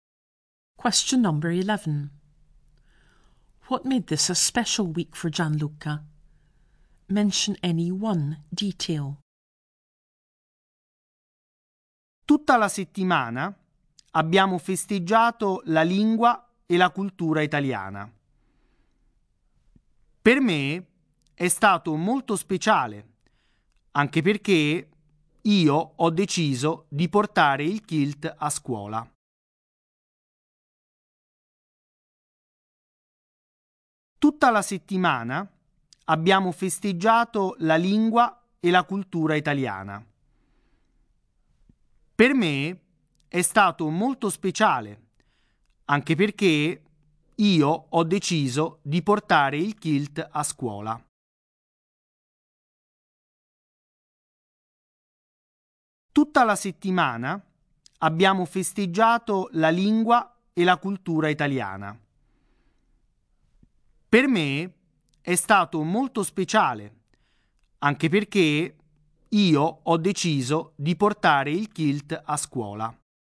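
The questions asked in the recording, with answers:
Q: What made this a special week for Gianluca?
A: They celebrated Italian language and culture; he wore a kilt to school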